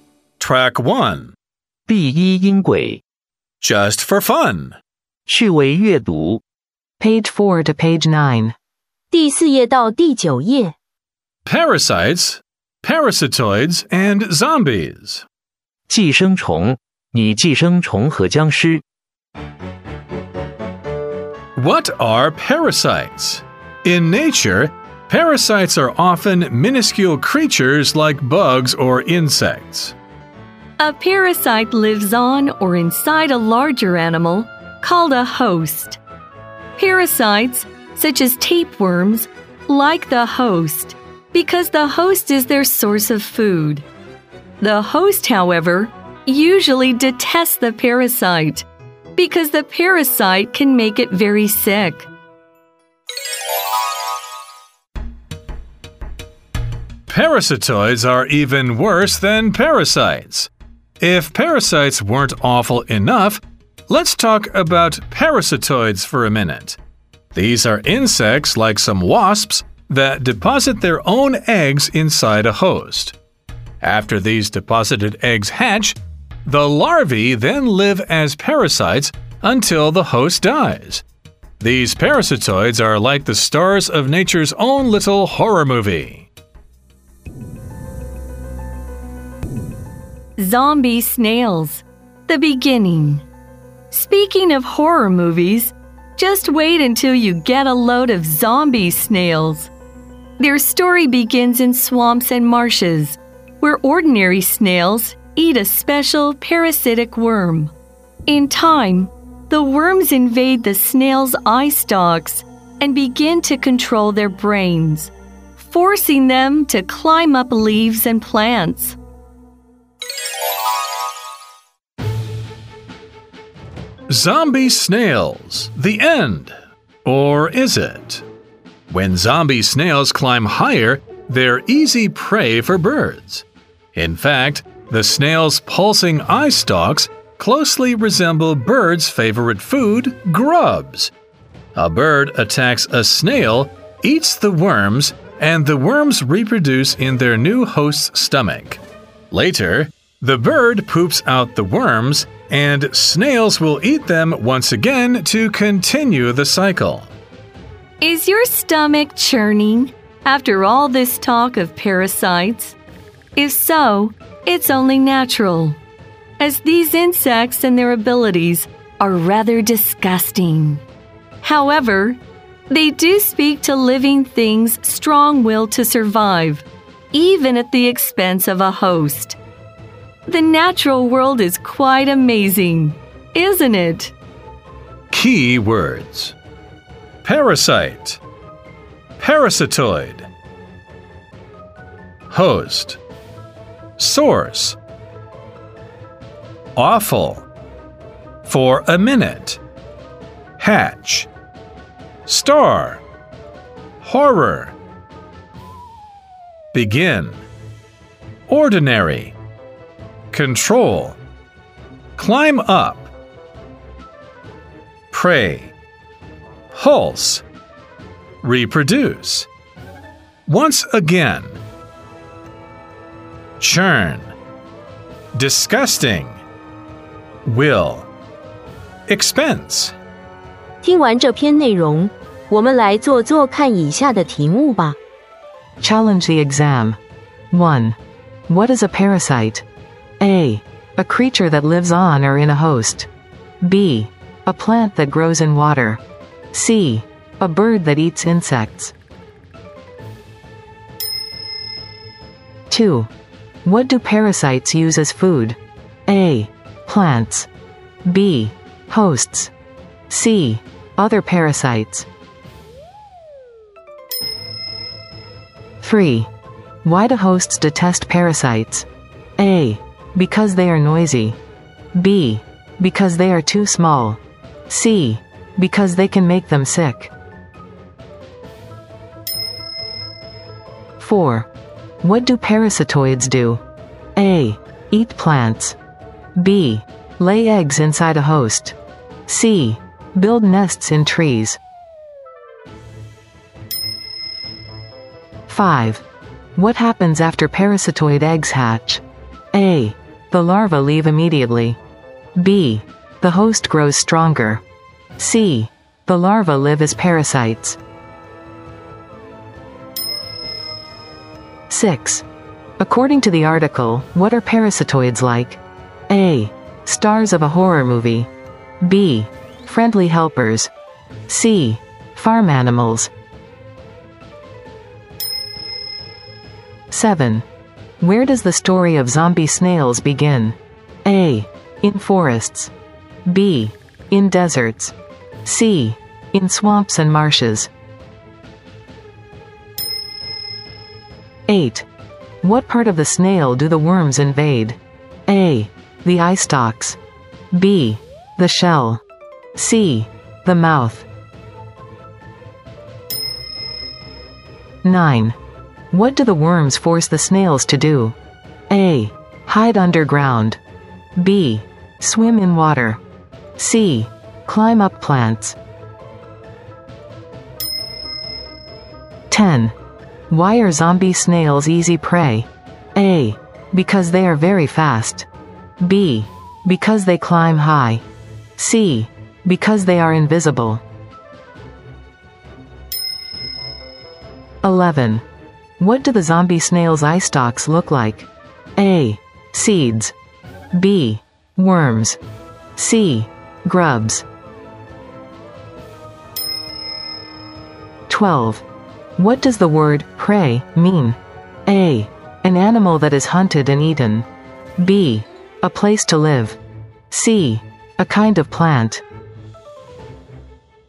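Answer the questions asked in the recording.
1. A: A creature that lives on or in a host.
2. B: Hosts.
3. C: Because they can make them sick.
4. B: Lay eggs inside a host.
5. C: The larvae live as parasites.
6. A: Stars of a horror movie.
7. C: In swamps and marshes.
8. A: The eye stalks.
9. C: Climb up plants.
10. B: Because they climb high.
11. C: Grubs.
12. A: An animal that is hunted and eaten.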